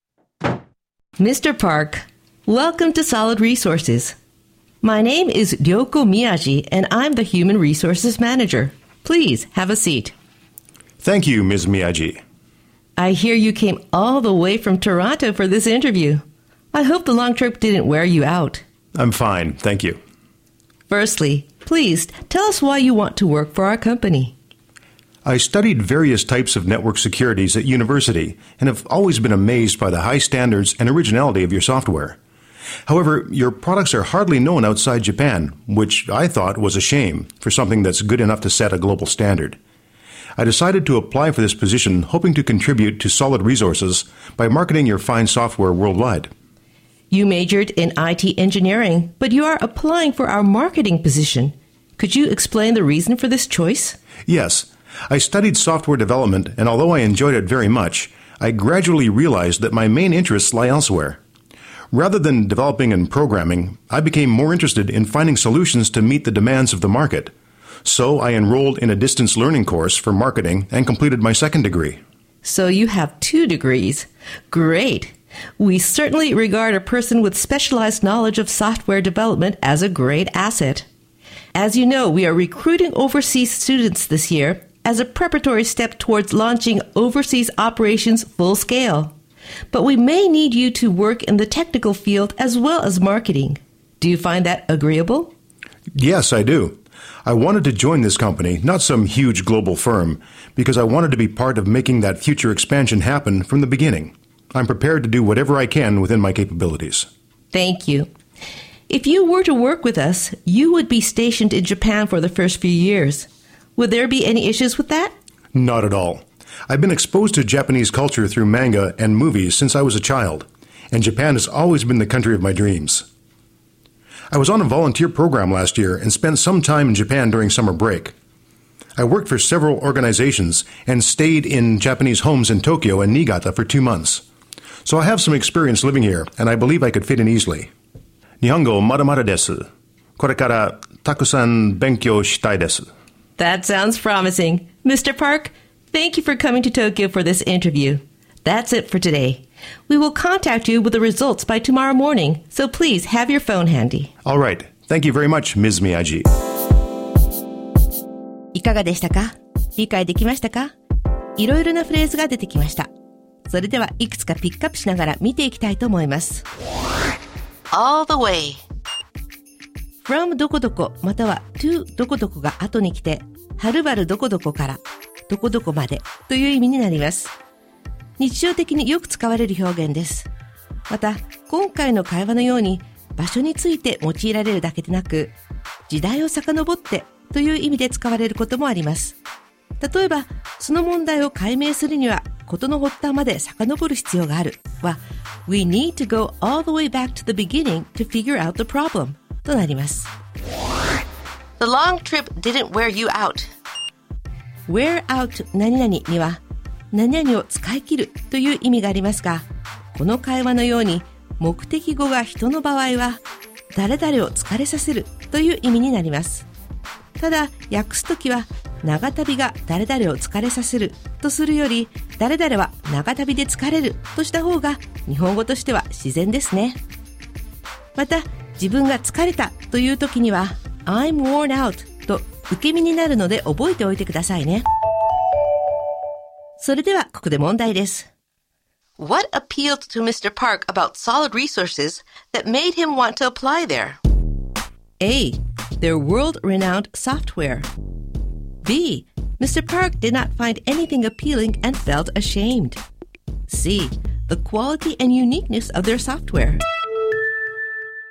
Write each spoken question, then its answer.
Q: What appealed to Mr. Park about solid resources that made him want to apply there?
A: C は彼らのソフトウェアのクオリティと独自性、これが正解です。